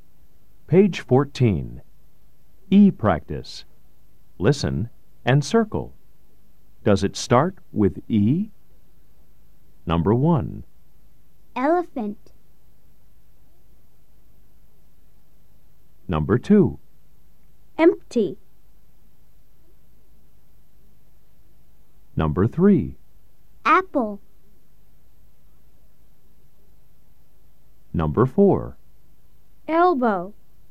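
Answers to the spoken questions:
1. Yes (elephant)
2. Yes (empty)
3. No (apple)
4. Yes (elbow)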